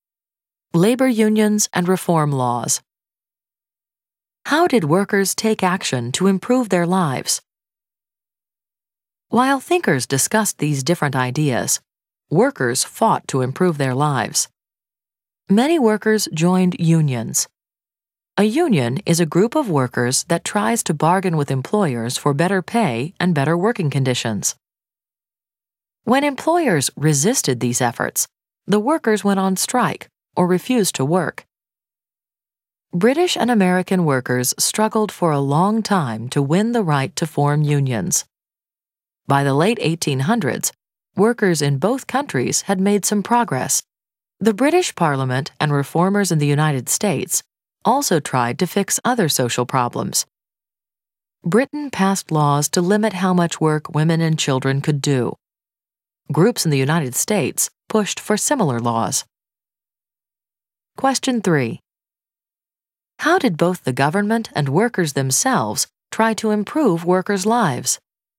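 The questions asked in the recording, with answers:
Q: How did both the government and workers themselves try to improve workers' lives?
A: Workers formed unions and went on strike; governments passed laws limiting how much women and children could work.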